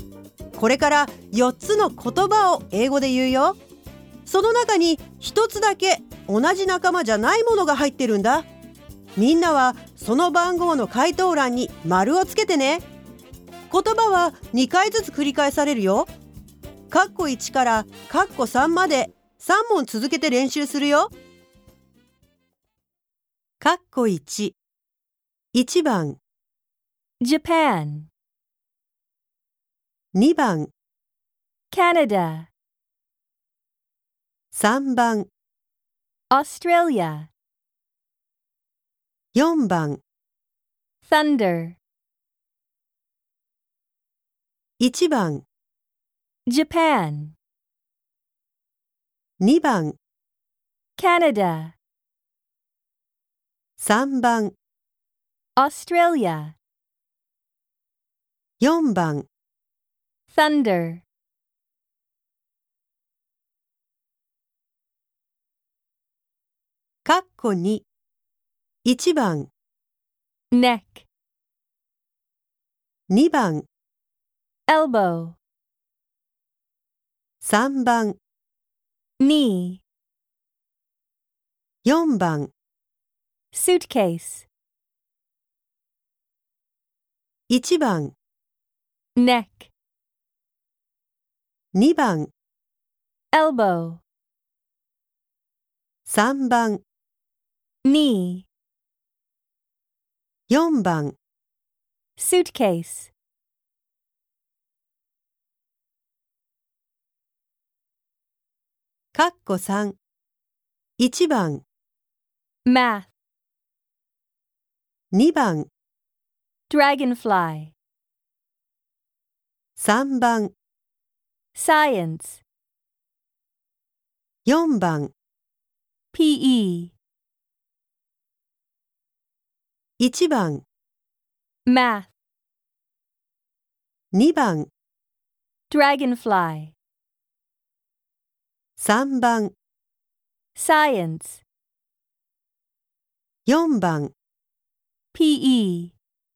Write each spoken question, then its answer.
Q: その中に一つだけ同じ仲間じゃないものが入ってるんだ。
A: 答えは4番の Thunder。

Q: その中に一つだけ同じ仲間じゃないものが入ってるんだ。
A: 答えは4番のスーツケース。

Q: その中に一つだけ同じ仲間じゃないものが入ってるんだ。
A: 答えは2番のドラゴンフライ。